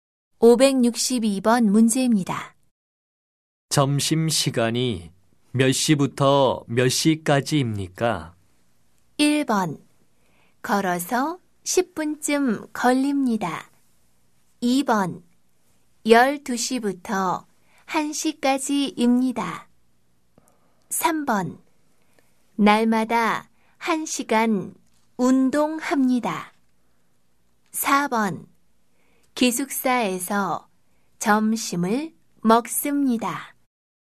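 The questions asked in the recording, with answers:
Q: 점심시간이 몇 시부터 몇 시까지입니까?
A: 2: 12시부터 1시까지입니다.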